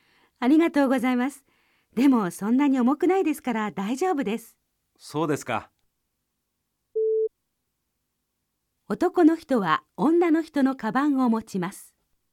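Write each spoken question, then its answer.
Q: 男の人は女の人のカバンを持ちます。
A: いいえ(×)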